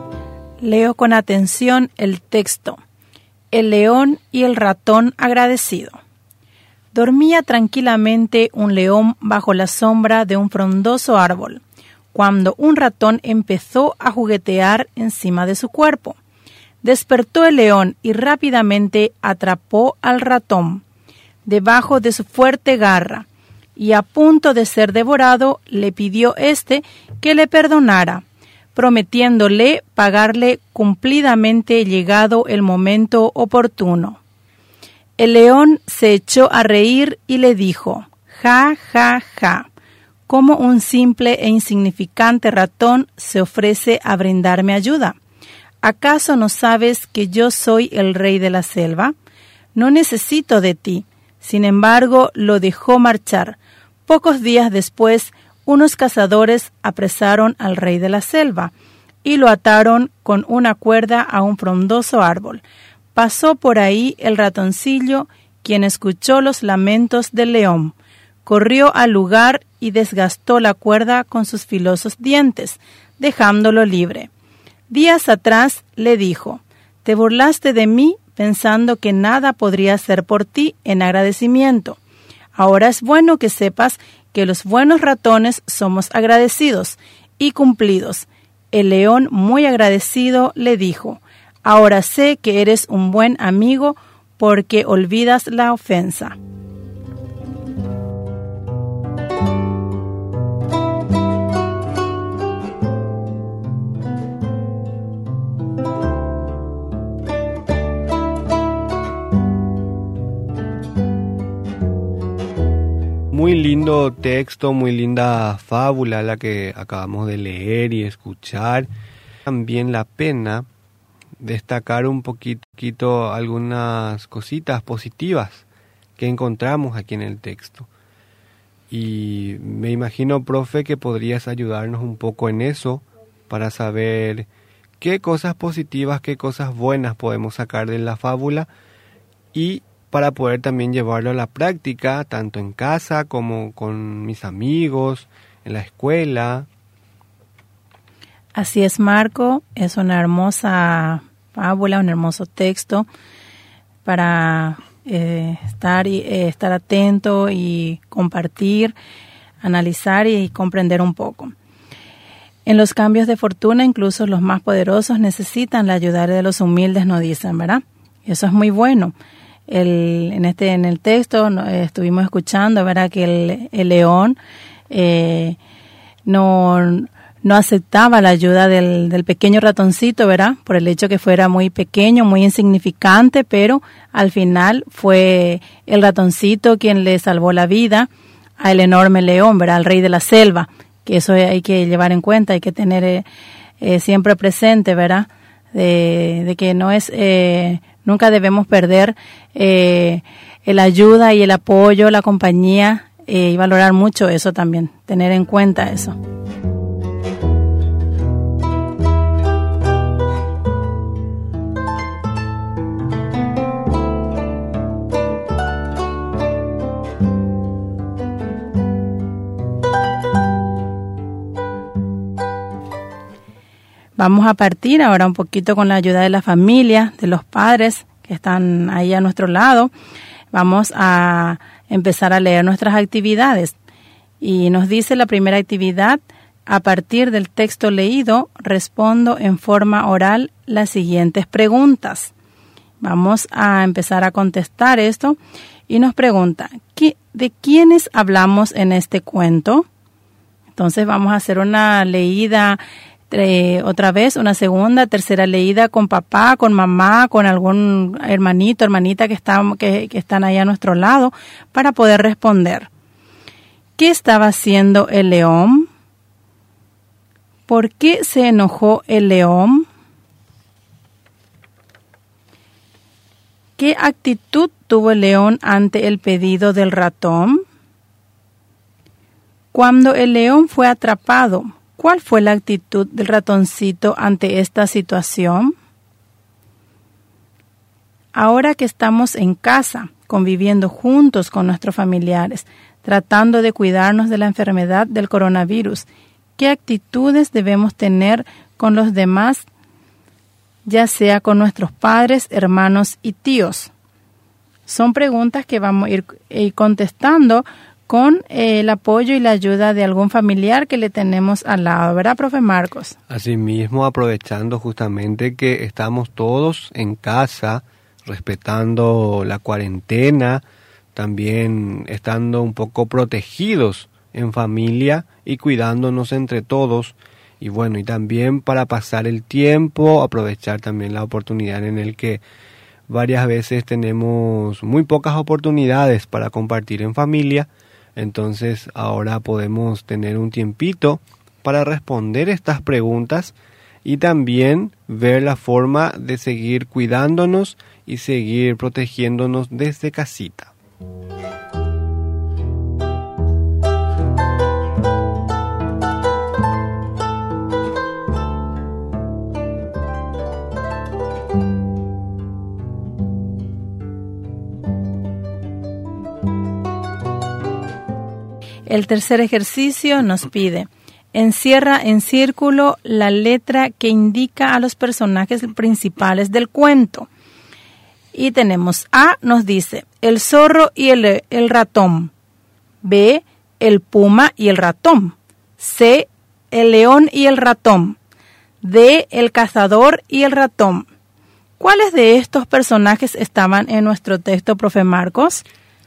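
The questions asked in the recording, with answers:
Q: ¿de quiénes hablamos en este cuento?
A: Del león y del ratón

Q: ¿Qué estaba haciendo el león?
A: Dormía tranquilamente bajo la sombra de un frondoso árbol

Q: ¿Por qué se enojó el león?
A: Porque el ratón empezó a juguetear encima de su cuerpo y lo despertó

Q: ¿Qué actitud tuvo el león ante el pedido del ratón?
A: Se rio de él, pero lo perdonó y lo dejó marchar

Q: Cuando el león fue atrapado, ¿cuál fue la actitud del ratoncito ante esta situación?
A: Lo ayudó: desgastó la cuerda con sus dientes y lo liberó

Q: encierra en círculo la letra que indica a los personajes principales del cuento.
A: C: el león y el ratón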